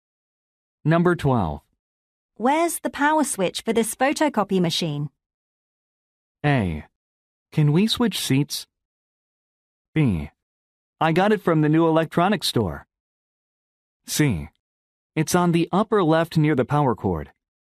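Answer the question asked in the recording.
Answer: C: It's on the upper left near the power cord.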